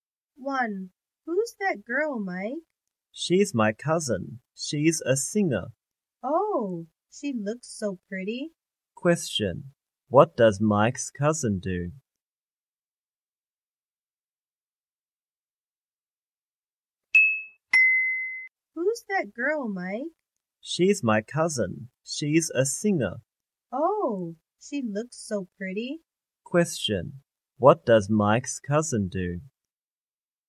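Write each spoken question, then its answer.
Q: What does Mike's cousin do?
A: She's a singer.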